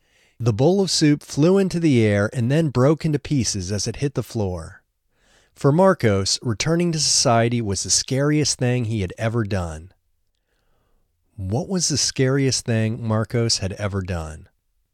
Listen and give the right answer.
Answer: Returning to society was the scariest thing Marcos had ever done.